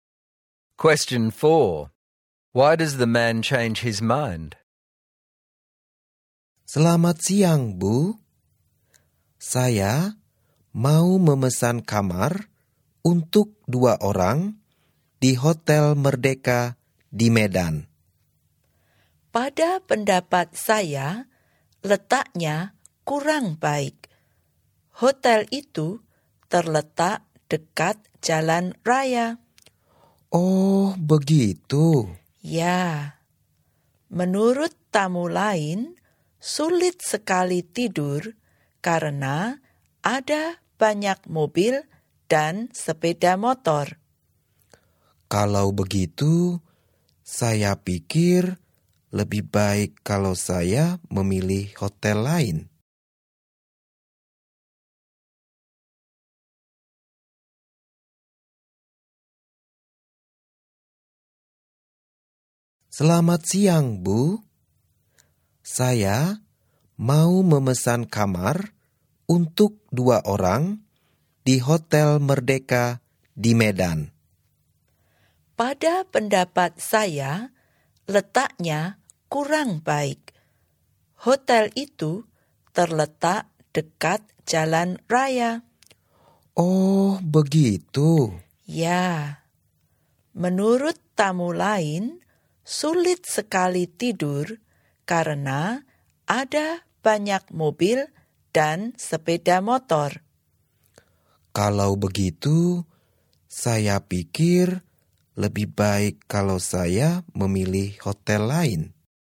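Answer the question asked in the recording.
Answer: The hotel is near a main road, so other guests say it is hard to sleep because of the cars and motorbikes.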